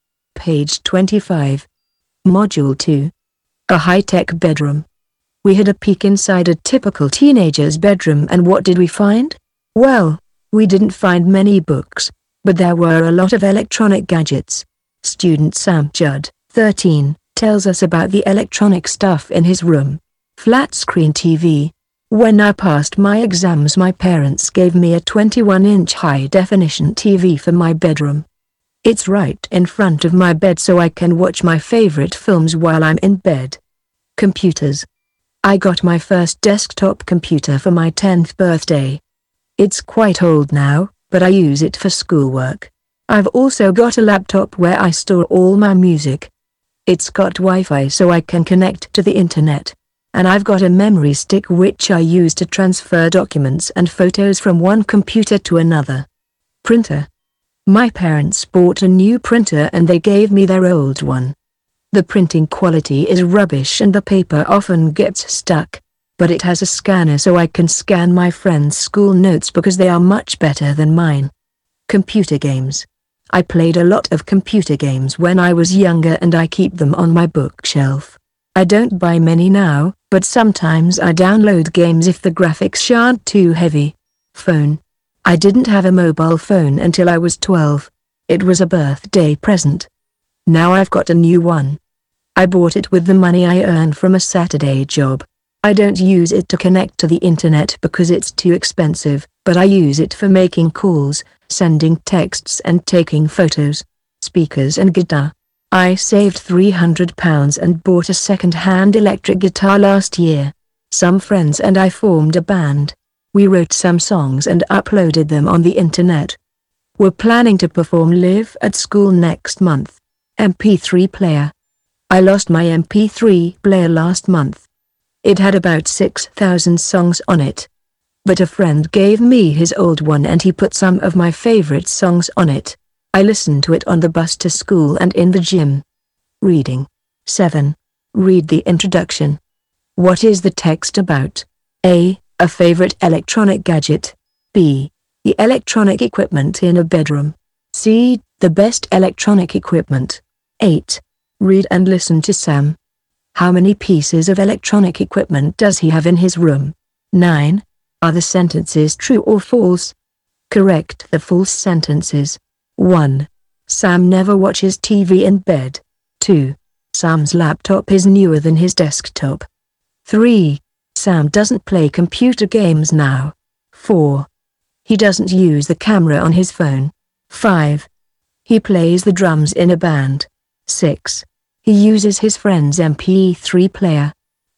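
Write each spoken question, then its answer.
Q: Sam never watches TV in bed.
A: False: he watches films in bed

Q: Sam doesn't play computer games now.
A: False: he sometimes downloads games

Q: He doesn't use the camera on his phone.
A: False: he uses it for taking photos

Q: He plays the drums in a band.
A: False: he plays electric guitar

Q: He uses his friend's MP3 player.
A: True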